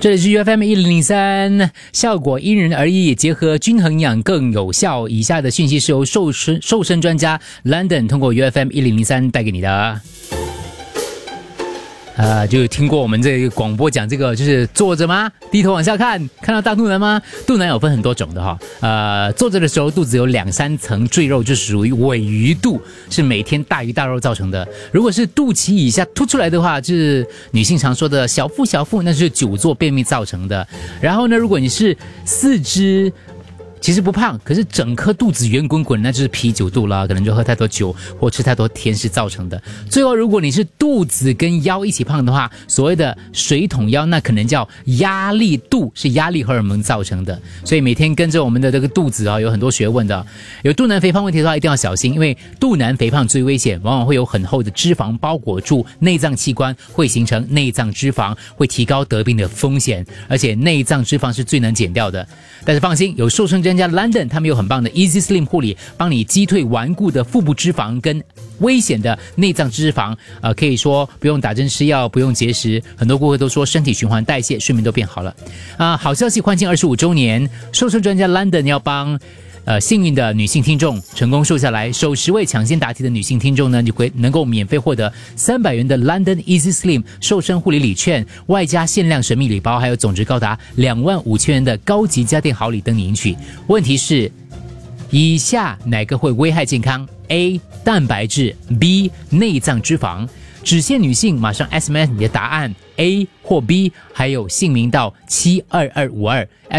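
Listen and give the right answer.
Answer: B: 内脏脂肪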